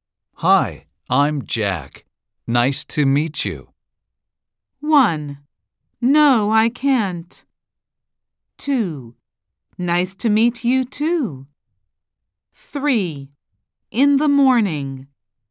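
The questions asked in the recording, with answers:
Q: Hi, I'm Jack. Nice to meet you.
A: 2: Nice to meet you, too.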